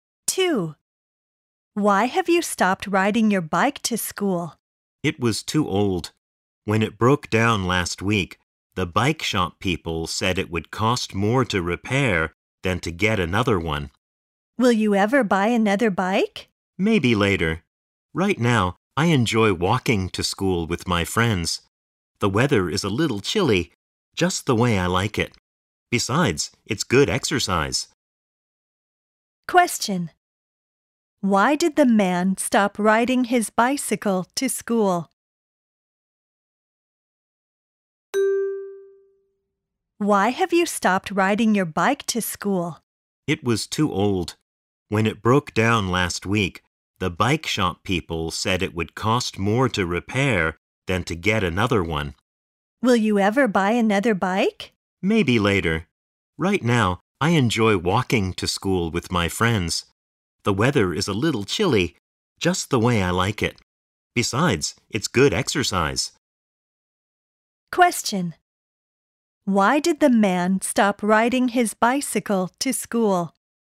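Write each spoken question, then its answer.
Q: Why did the man stop riding his bicycle to school?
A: His bike was old and broke down; repairing it would cost more than a new one.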